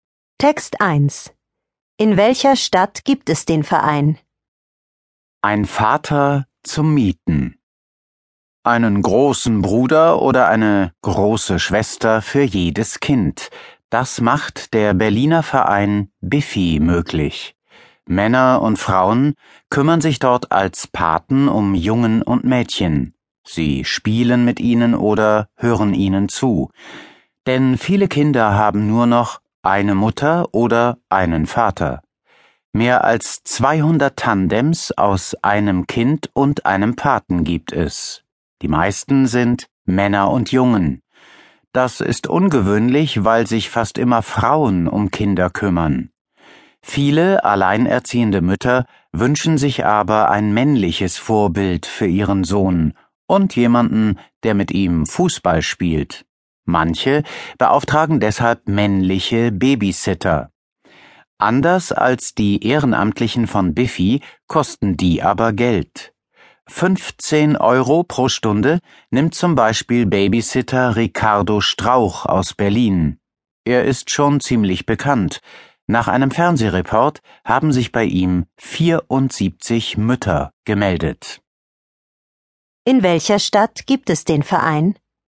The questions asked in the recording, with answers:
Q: In welcher Stadt gibt es den Verein?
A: In Berlin.